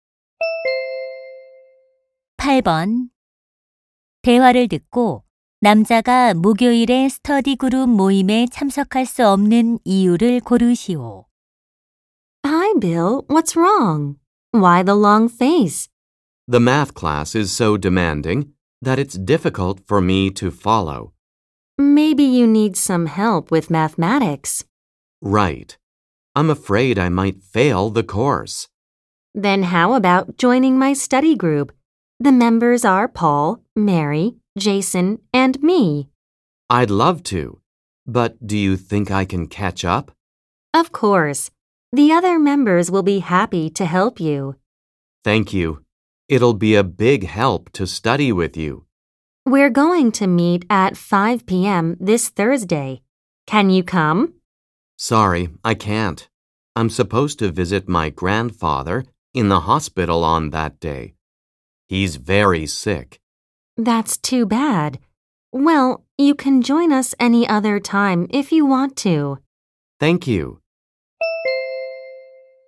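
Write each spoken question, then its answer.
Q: 대화를 듣고 남자가 목요일에 스터디 그룹 모임에 참석할 수 없는 이유를 고르시오.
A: 병원에 계신 할아버지를 찾아뵈어야 해서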